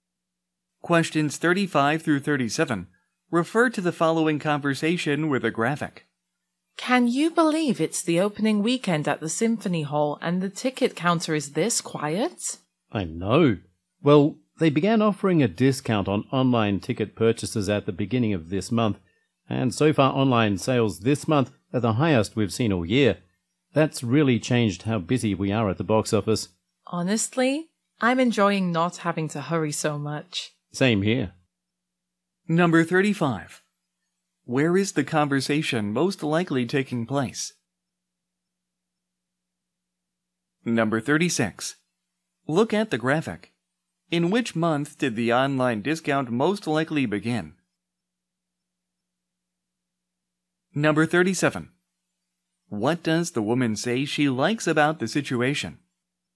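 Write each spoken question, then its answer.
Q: Where is the conversation most likely taking place?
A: At the Symphony Hall box office

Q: What does the woman say she likes about the situation?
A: Not having to hurry so much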